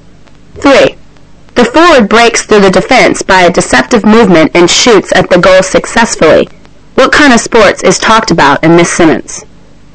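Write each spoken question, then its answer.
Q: What kind of sports is talked about in this sentence?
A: Football (soccer)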